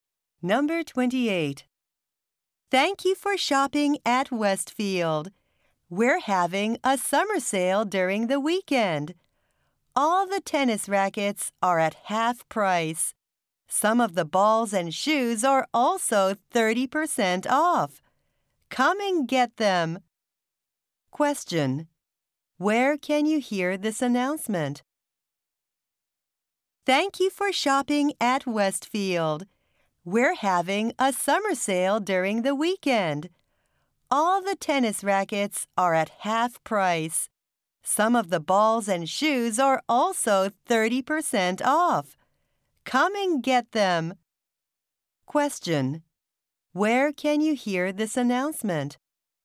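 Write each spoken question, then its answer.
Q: Where can you hear this announcement?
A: At a store (sports shop at Westfield)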